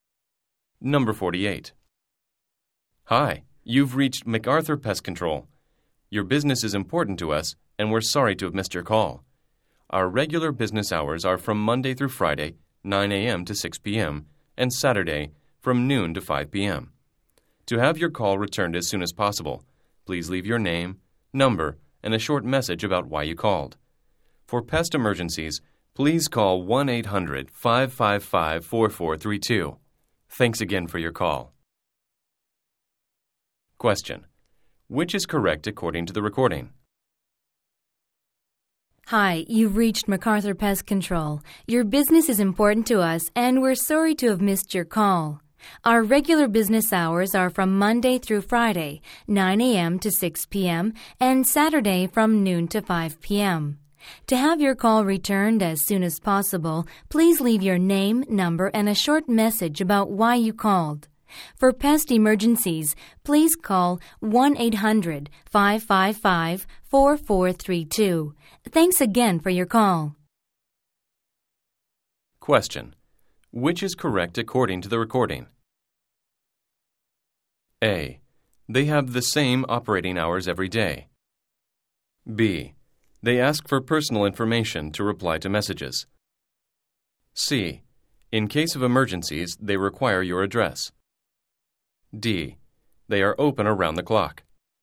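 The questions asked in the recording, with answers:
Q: Which is correct according to the recording?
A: B: They ask for personal information to reply to messages.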